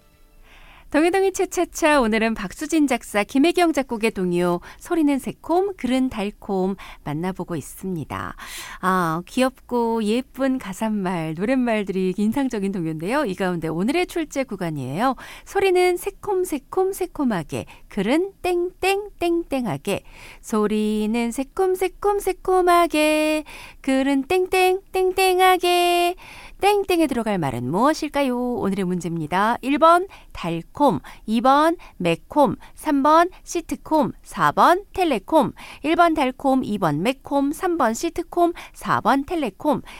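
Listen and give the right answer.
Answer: 1: 달콤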